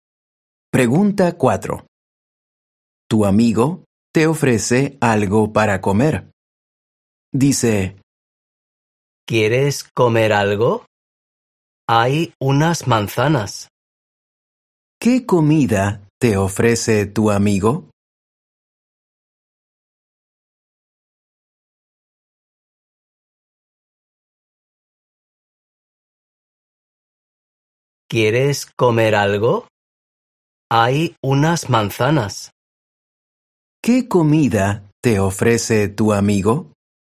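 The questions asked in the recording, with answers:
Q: ¿Qué comida te ofrece tu amigo?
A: Unas manzanas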